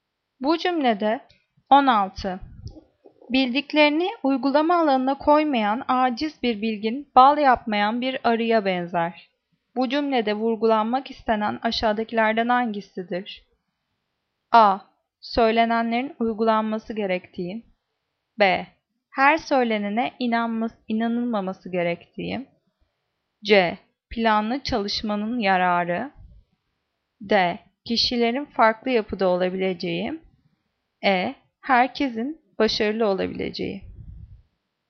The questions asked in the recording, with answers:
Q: Bu cümlede vurgulanmak istenen aşağıdakilerden hangisidir?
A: Cevap A. Söylenenlerin uygulanması gerektiği.